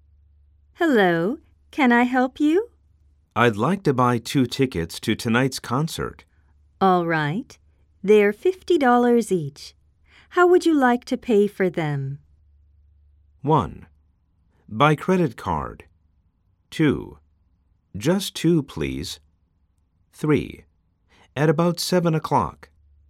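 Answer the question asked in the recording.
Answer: 1: By credit card.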